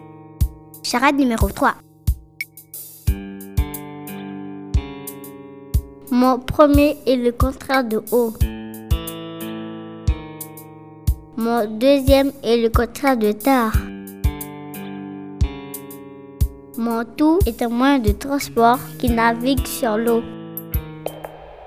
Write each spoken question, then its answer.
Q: Mon tout est un moyen de transport qui navigue sur l'eau.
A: La bonne réponse est un bateau.